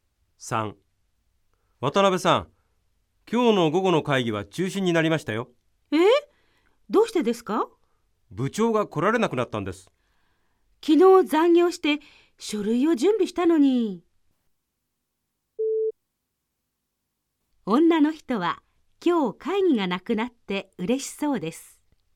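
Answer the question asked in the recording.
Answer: ×(間違い)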